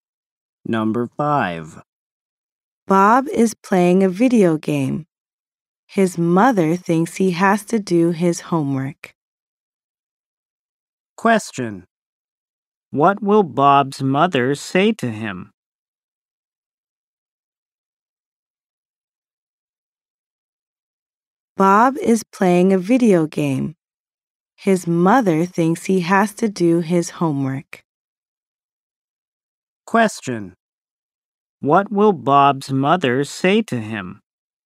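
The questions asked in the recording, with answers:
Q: What will Bob's mother say to him?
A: You have to do your homework.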